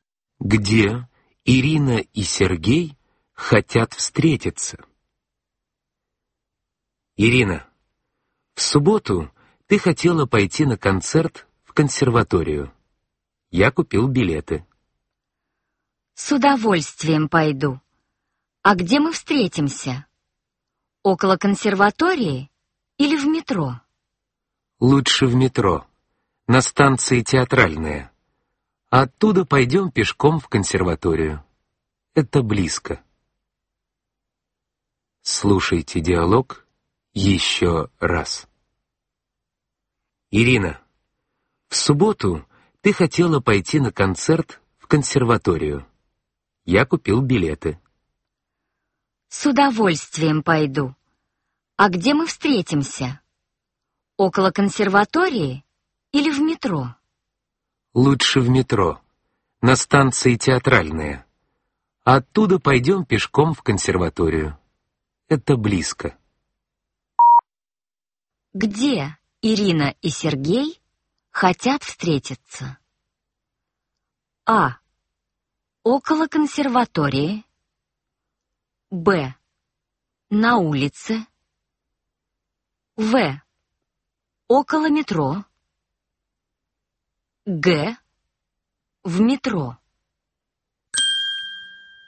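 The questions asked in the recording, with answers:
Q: Где Ирина и Сергей хотят встретиться?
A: Г: В метро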